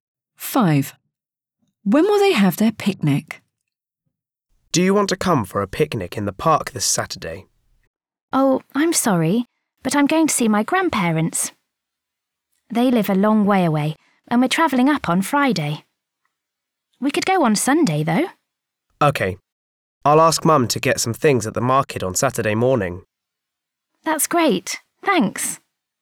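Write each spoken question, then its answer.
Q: When will they have their picnic?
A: On Sunday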